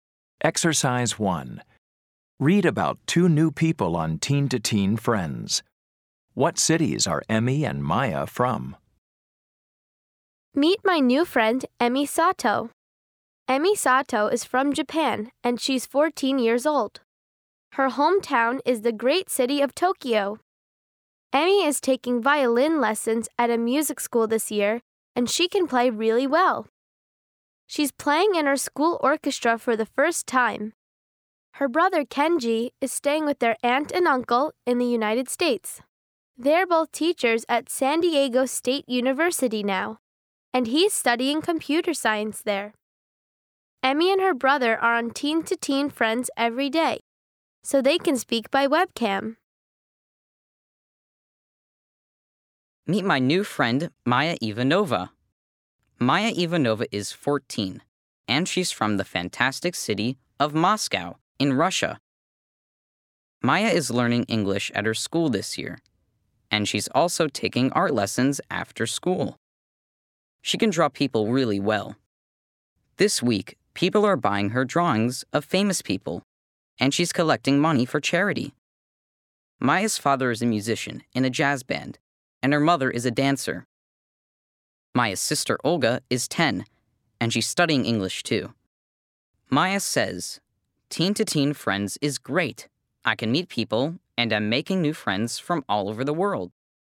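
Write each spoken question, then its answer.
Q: What cities are Emmy and Maya from?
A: Emmy is from Tokyo and Maya is from Moscow.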